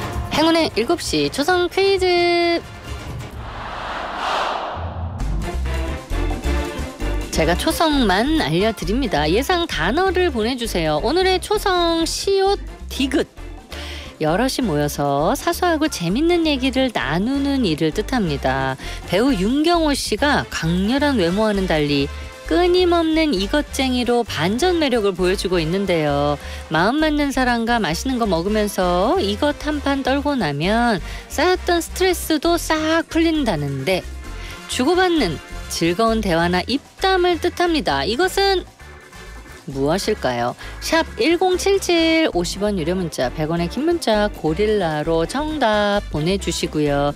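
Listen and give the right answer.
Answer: 수다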